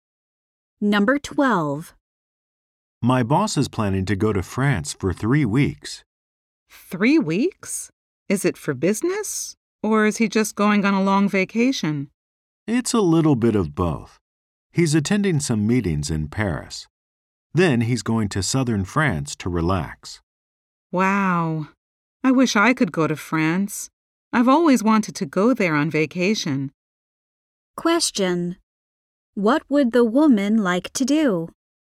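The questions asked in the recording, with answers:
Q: What would the woman like to do?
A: Go to France on vacation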